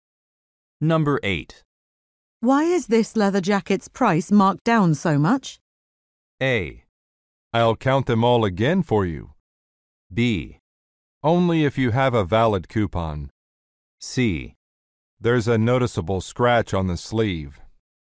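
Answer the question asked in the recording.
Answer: C: There's a noticeable scratch on the sleeve.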